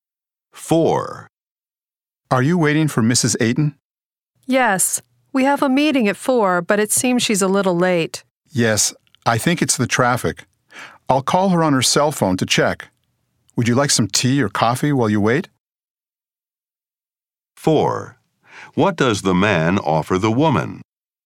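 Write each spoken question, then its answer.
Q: What does the man offer the woman?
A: Some tea or coffee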